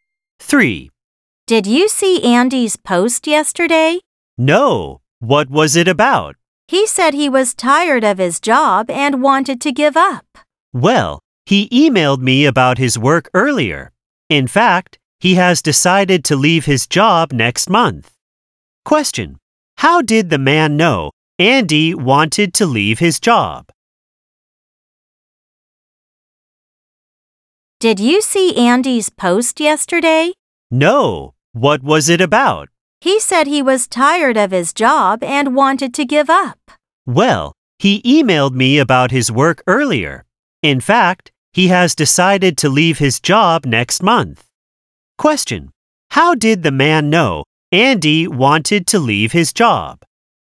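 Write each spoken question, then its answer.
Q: How did the man know Andy wanted to leave his job?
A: Andy emailed him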